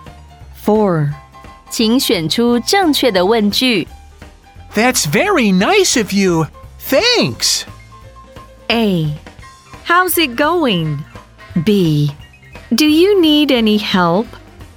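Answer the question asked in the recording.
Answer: B: Do you need any help?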